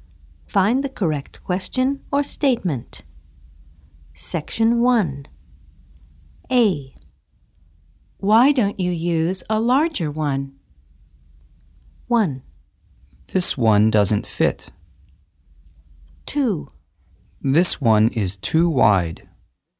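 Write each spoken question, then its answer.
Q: Why don't you use a larger one?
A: 1: This one doesn't fit.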